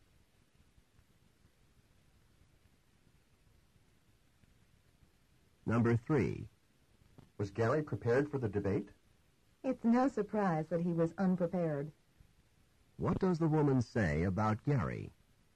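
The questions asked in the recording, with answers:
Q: What does the woman say about Gary?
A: He was unprepared, as expected.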